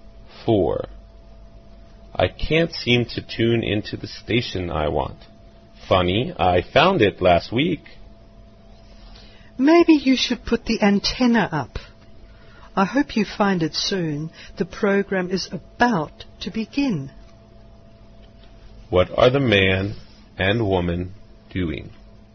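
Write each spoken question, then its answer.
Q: What are the man and woman doing?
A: Trying to tune in to a station for a program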